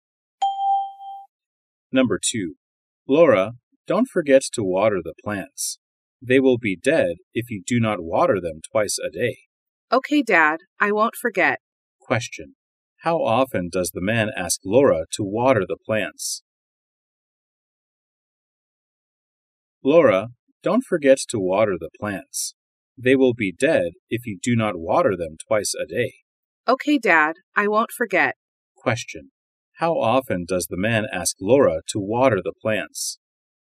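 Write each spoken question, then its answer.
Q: How often does the man ask Laura to water the plants?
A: Twice a day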